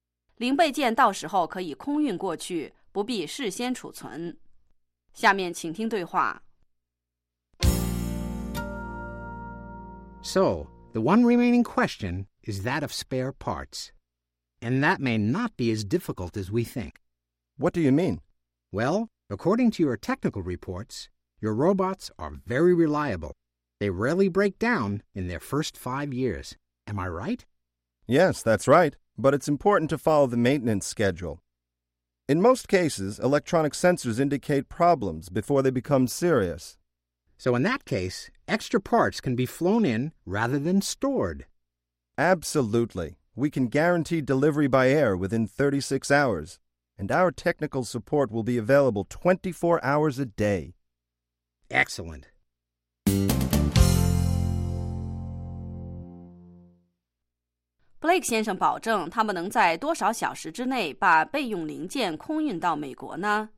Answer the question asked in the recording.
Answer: We can guarantee delivery by air within 36 hours.